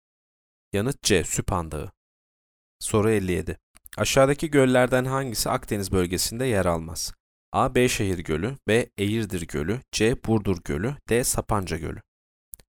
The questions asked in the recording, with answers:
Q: Aşağıdaki göllerden hangisi Akdeniz bölgesinde yer almaz?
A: D. Sapanca Gölü.